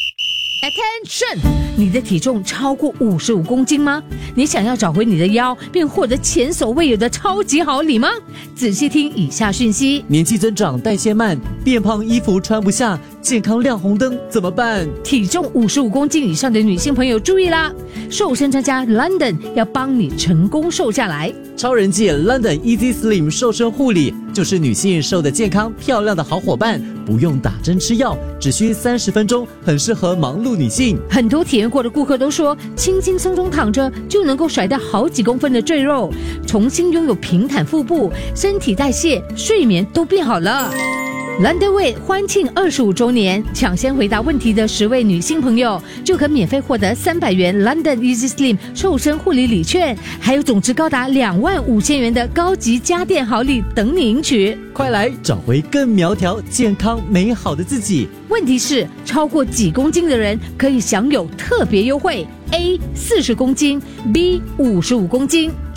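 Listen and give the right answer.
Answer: B: 55公斤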